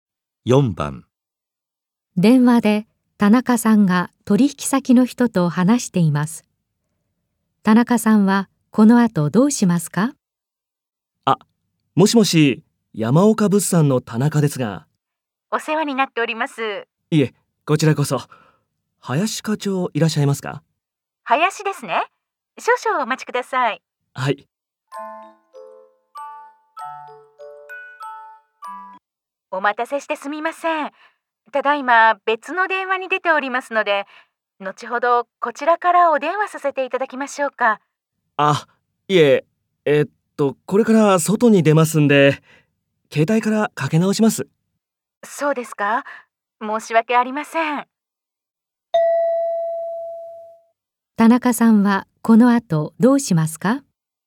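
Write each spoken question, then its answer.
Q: 田中さんはこの後どうしますか?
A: 後で携帯から林課長に電話をかけ直す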